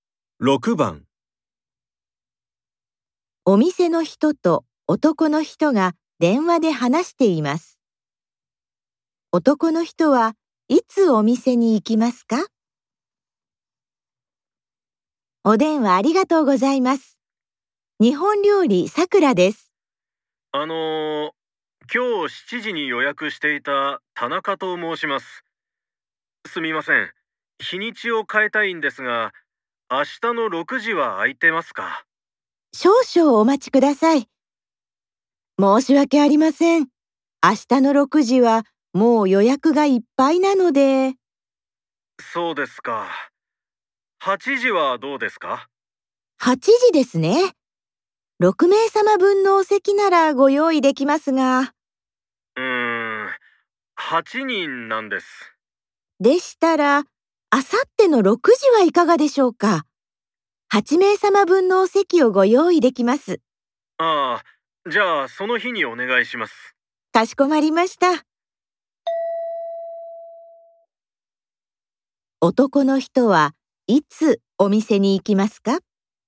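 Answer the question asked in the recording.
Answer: あさっての6時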